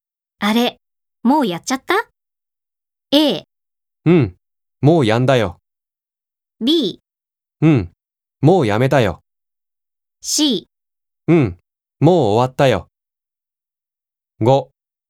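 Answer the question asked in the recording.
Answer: C: うん、もう終わったよ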